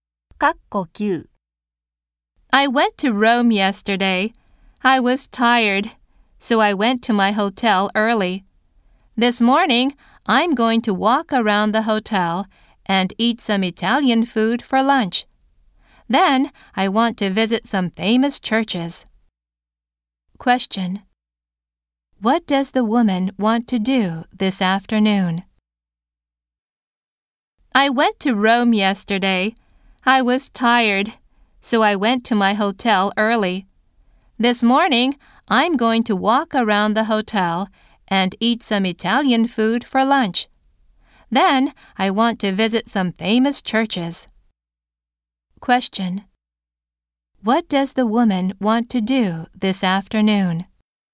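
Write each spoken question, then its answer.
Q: What does the woman want to do this afternoon?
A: Visit some famous churches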